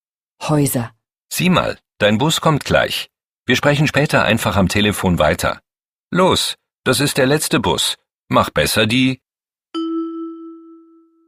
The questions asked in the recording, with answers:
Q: Mach besser die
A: Fliege.